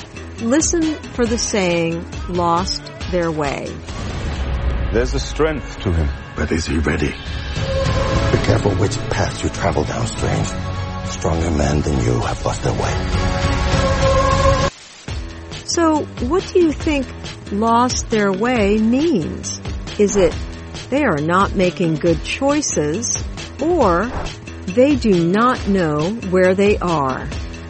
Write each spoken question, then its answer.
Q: So, what do you think lost their way means?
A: In this example, lost their way means they are not making good choices.